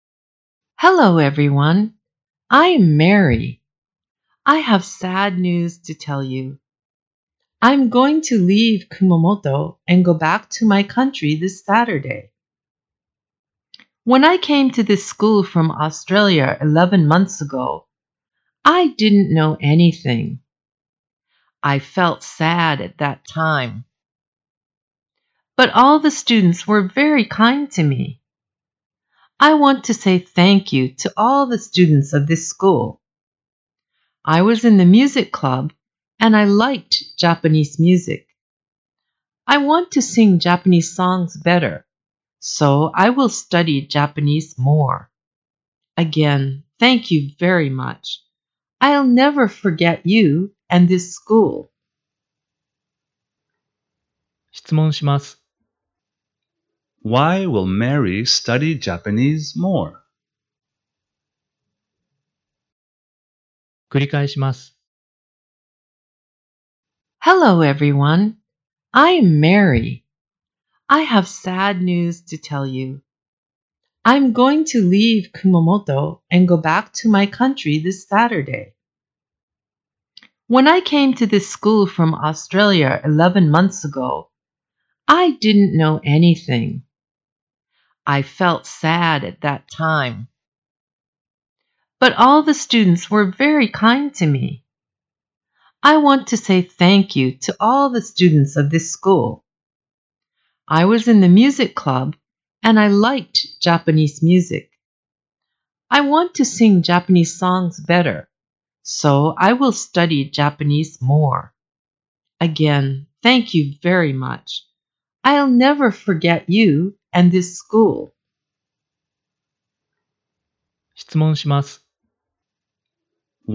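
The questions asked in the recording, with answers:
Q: Why will Mary study Japanese more?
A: Because she wants to sing Japanese songs better.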